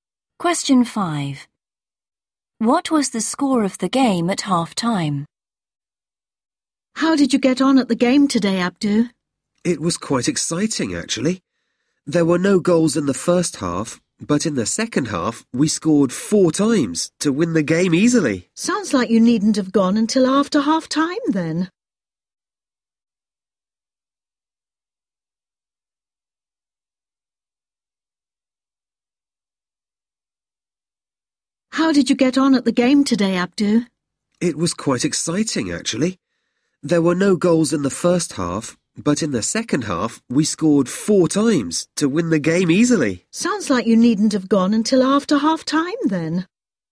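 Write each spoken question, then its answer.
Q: What was the score of the game at half-time?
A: 0-0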